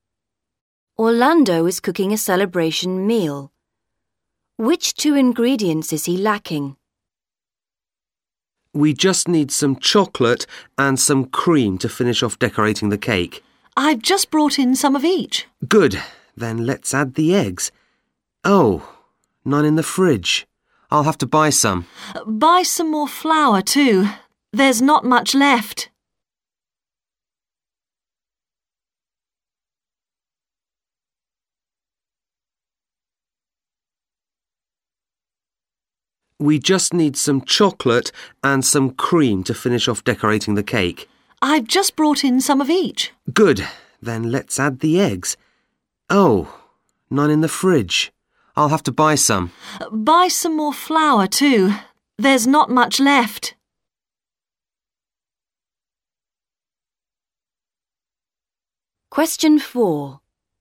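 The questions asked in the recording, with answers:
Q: Which 2 ingredients is he lacking?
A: Eggs and flour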